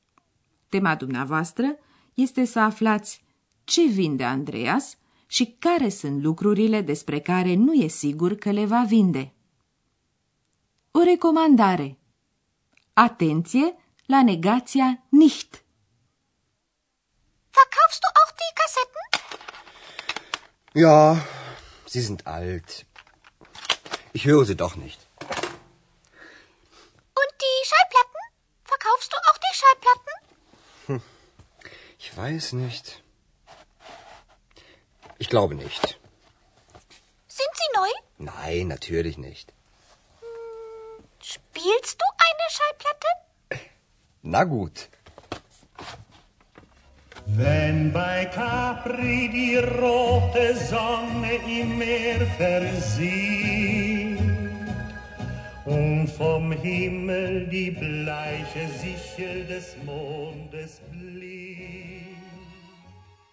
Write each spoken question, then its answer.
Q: Tema dumneavoastră este să aflați ce vinde Andreas și care sunt lucrurile despre care nu e sigur că le va vinde.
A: Andreas vrea să vândă casetele. Despre discuri nu știe încă nici el dacă le va vinde sau nu.